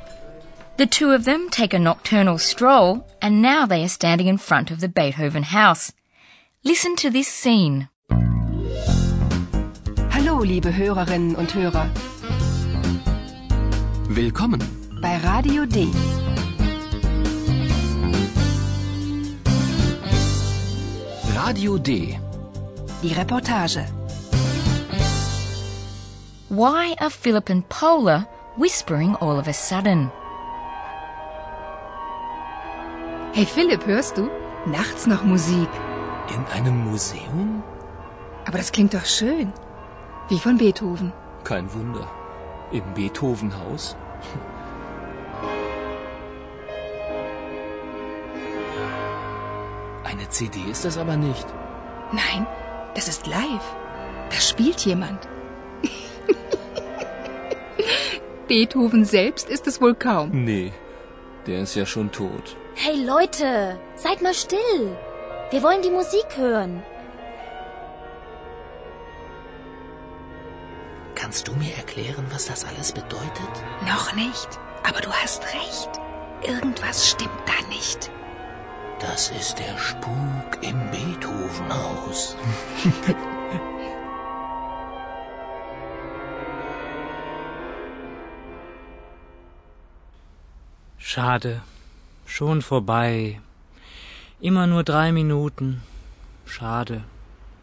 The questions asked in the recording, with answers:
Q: Why are Philip and Paula whispering all of a sudden?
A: And after this request, Philip and Paula start whispering.